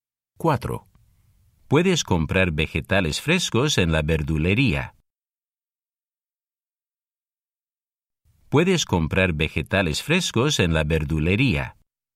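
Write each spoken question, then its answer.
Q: Puedes comprar vegetales frescos en la verdulería.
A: sí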